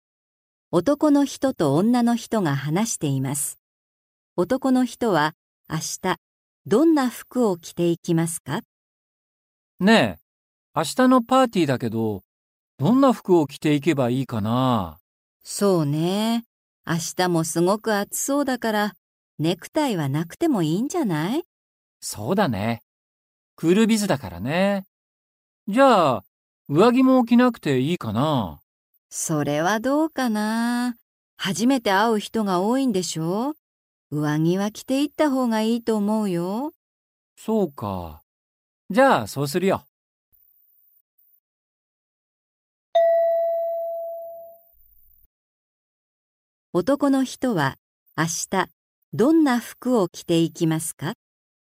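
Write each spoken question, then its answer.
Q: 男の人は、明日、どんな服を着ていきますか?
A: 上着を着て、ネクタイはしない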